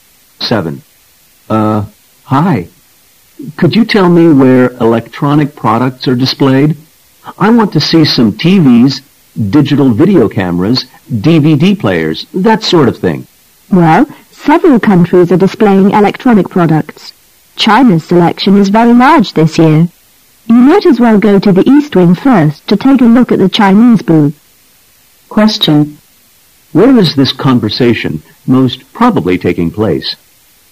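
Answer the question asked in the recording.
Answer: At an international electronics exhibition.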